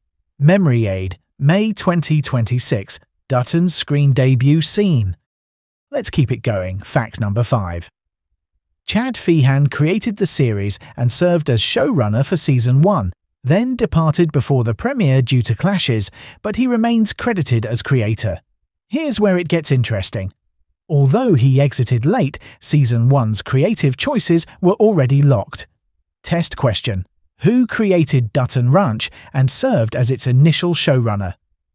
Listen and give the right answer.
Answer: Chad Feehan.